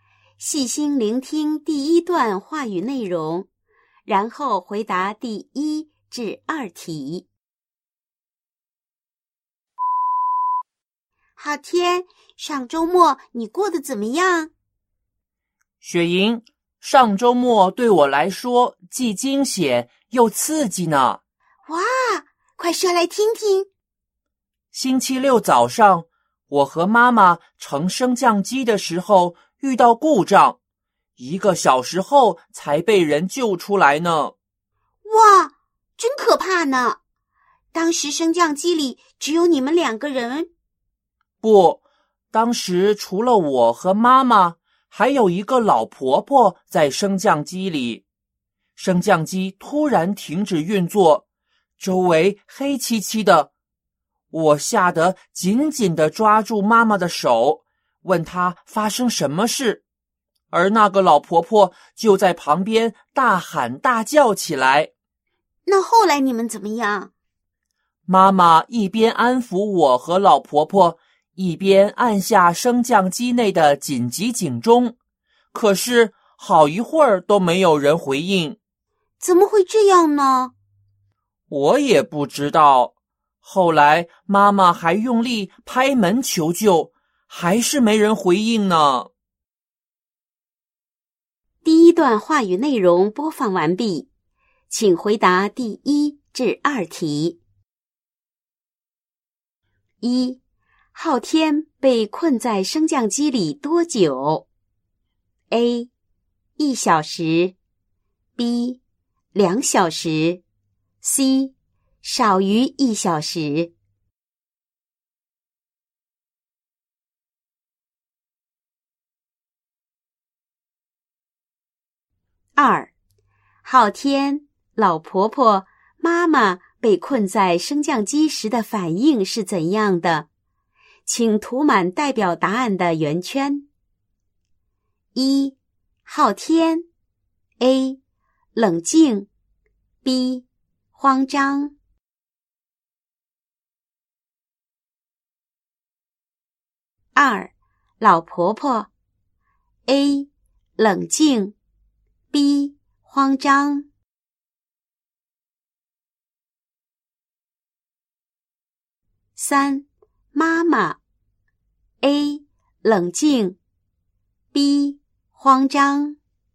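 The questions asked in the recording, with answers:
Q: 昊天被困在升降机里多久?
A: A: 一小时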